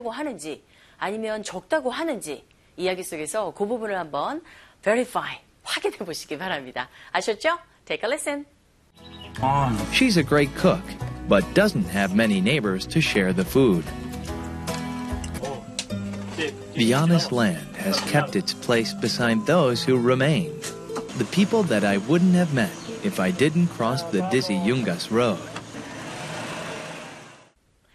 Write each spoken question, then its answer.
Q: 하는지 아니면 적다고 하는지 이야기 속에서 그 부분을 한번 verify, 확인해 보시기 바랍니다.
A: 요리를 나눠 먹을 이웃들이 많지 않았다고 합니다.